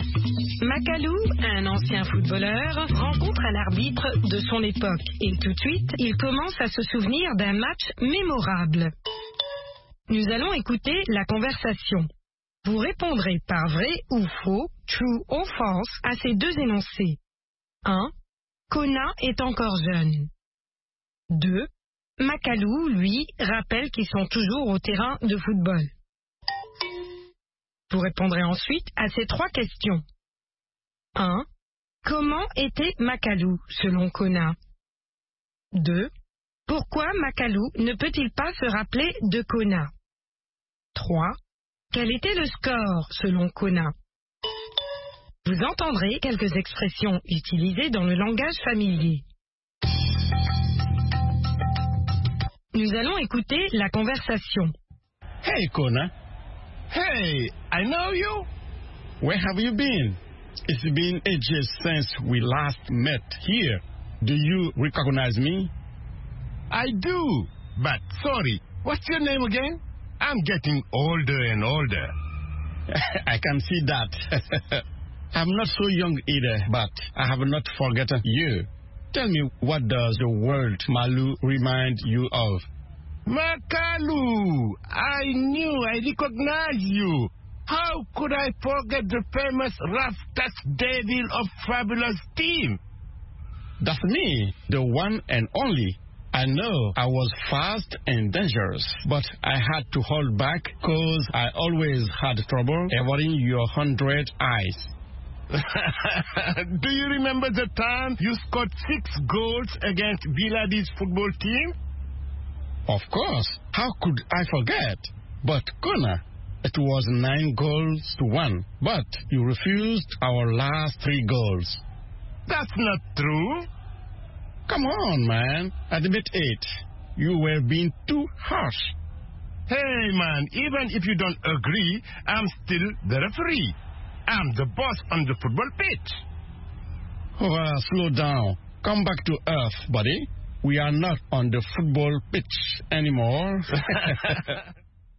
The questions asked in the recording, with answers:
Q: Kona est encore jeune.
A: L'énoncé 1 est faux.

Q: Makalou, lui, rappelle qu'ils sont toujours au terrain de football.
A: L'énoncé 2 est faux.

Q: Pourquoi Makalou ne peut-il pas se rappeler de Kona?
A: Parce qu'il devient de plus en plus vieux.